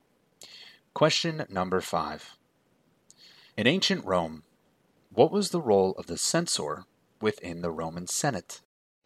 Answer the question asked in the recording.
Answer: And their role was to maintain the census.